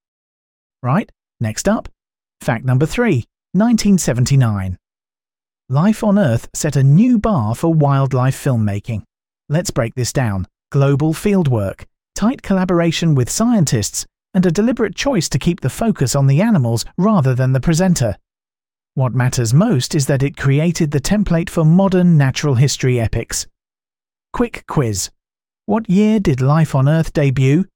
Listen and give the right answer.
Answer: Correct answer, 1979.